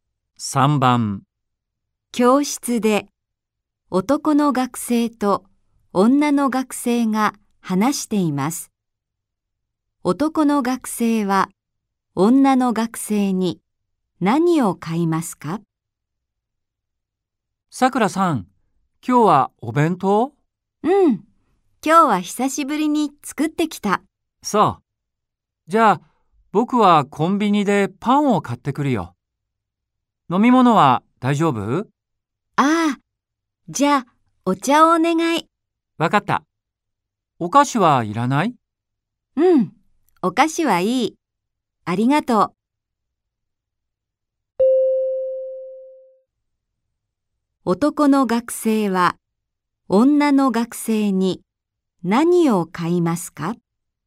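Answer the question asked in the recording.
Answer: お茶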